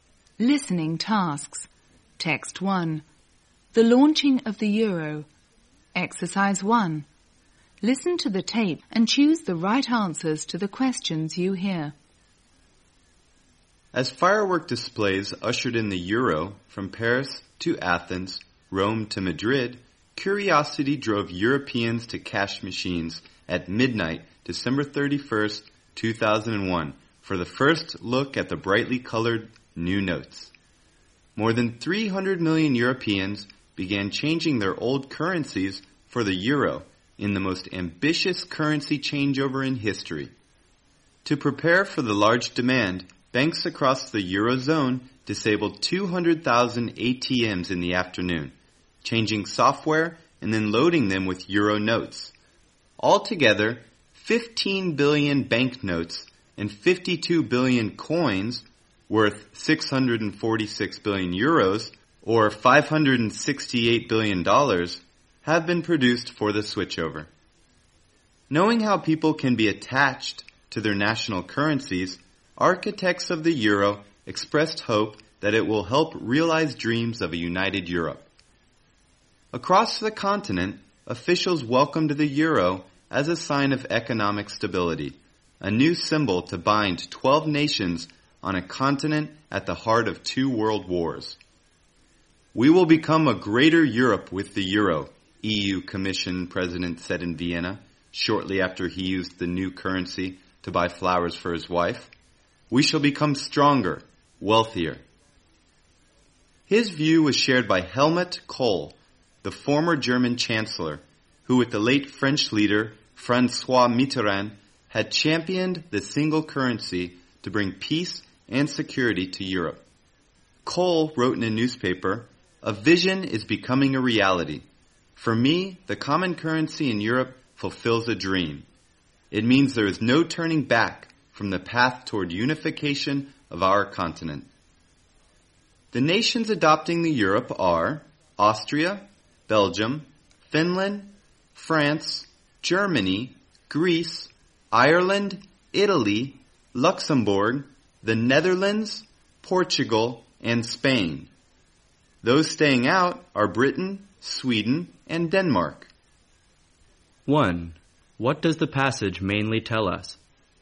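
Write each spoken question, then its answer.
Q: What does the passage mainly tell us?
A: The launch of the euro, as 12 European countries switched to the single currency at the start of 2002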